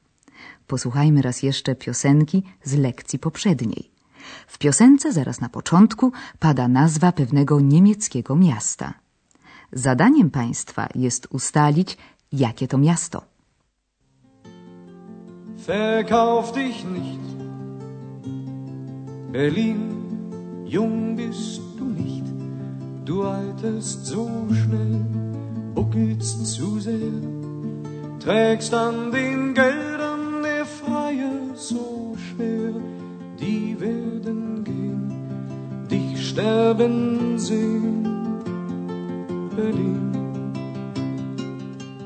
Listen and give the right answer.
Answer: I bez pomocy Andreasa odgadliby Państwo bez trudu, że miastem tym jest Berlin.